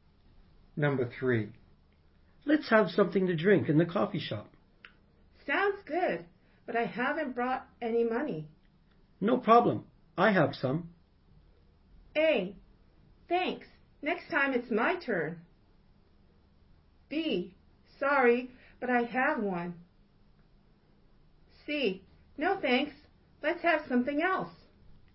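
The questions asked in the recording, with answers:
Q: No problem. I have some.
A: A: Thanks. Next time it's my turn.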